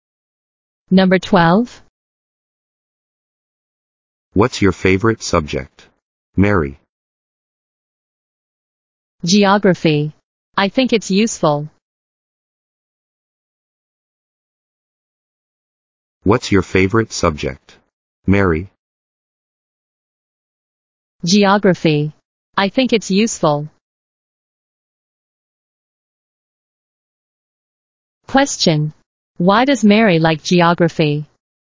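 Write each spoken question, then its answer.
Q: Why does Mary like geography?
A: She thinks it's useful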